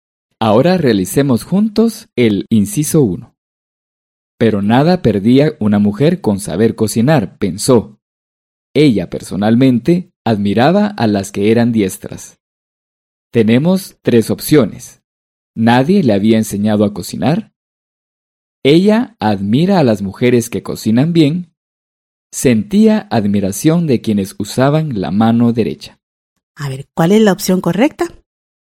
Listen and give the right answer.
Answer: Así es, la respuesta correcta es la segunda opción.